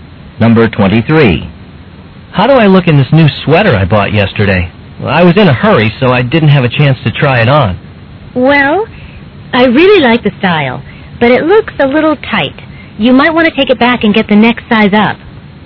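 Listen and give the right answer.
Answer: Exchange the sweater for a larger size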